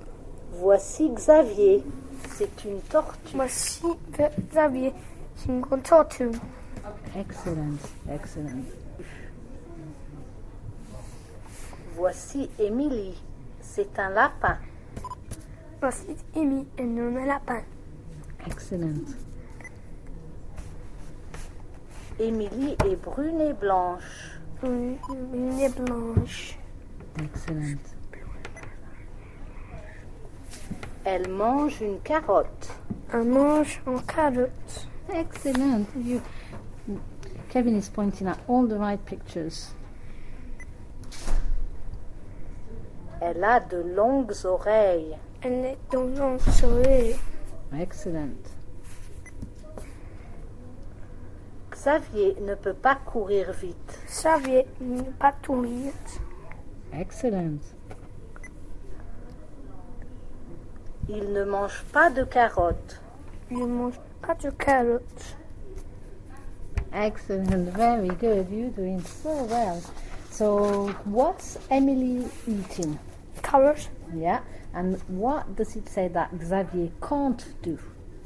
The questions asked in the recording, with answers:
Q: and what does it say that Xavier can't do?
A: Xavier ne peut pas courir vite.